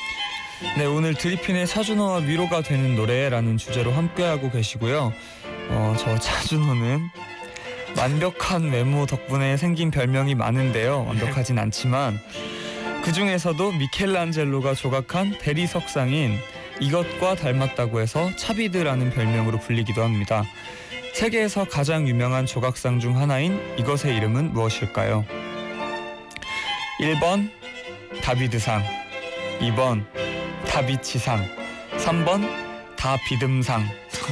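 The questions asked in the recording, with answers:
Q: 세계에서 가장 유명한 조각상 중 하나인 이것의 이름은 무엇일까요?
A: 1번: 다비드상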